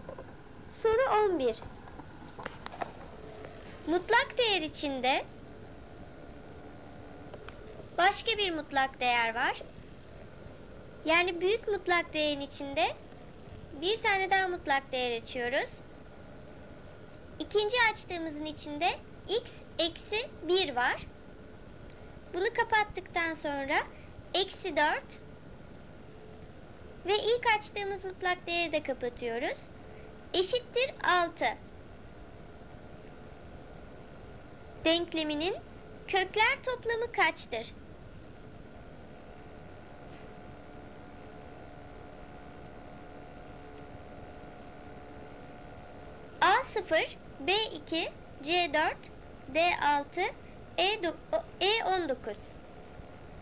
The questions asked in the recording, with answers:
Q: Denkleminin kökler toplamı kaçtır?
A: Doğru cevap B2.